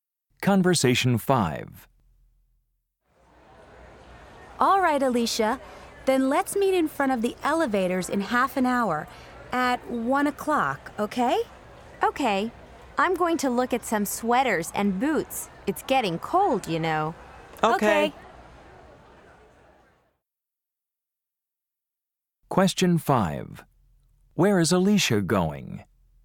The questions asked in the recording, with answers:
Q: Where is Alicia going?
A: Oh, Beth, isn't there a good clothing store on the first floor?